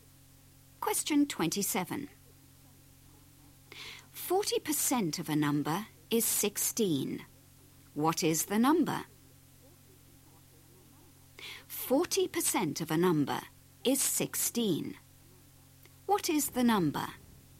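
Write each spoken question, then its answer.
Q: 40% of a number is 16. What is the number?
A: 40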